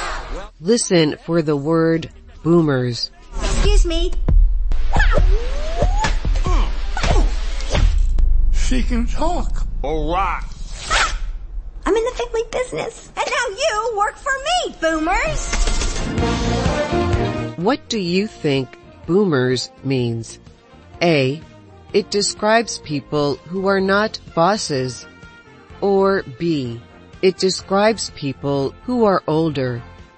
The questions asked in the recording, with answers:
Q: What do you think boomers means?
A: The answer is B. Boomers describes older people.